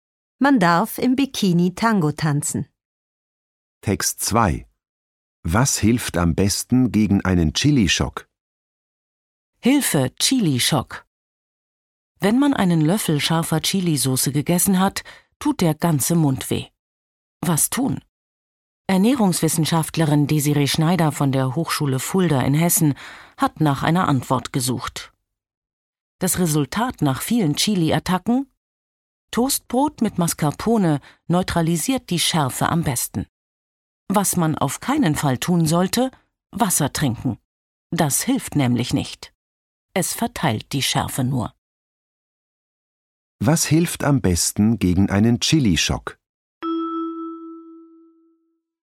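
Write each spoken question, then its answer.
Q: Was hilft am besten gegen einen Chili-Schock?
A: Toastbrot mit Mascarpone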